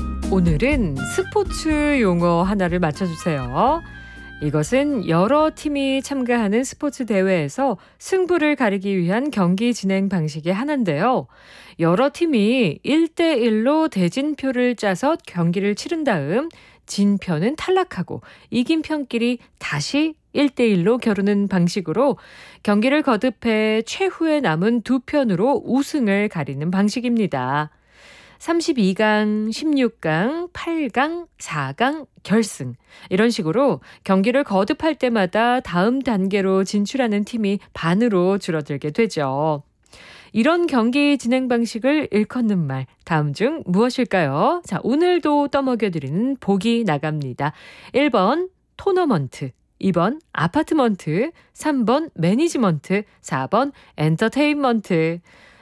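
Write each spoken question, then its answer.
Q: 이런 경기 진행 방식을 일컫는 말 다음 중 무엇일까요?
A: 1: 토너먼트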